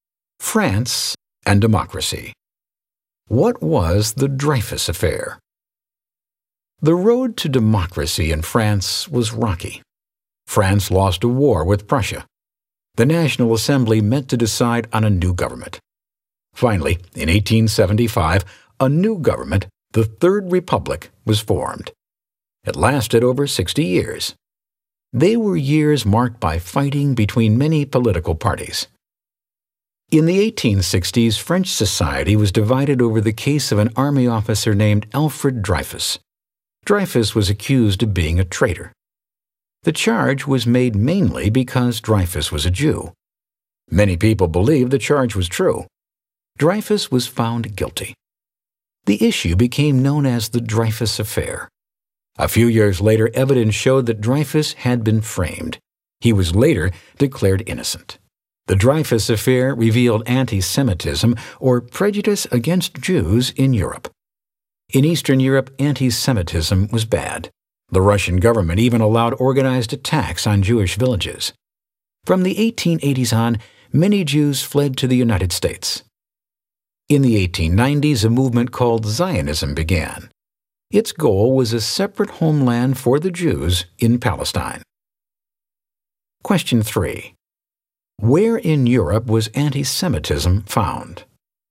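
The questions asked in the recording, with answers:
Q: Where in Europe was anti-Semitism found?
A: In France and in Eastern Europe, such as Russia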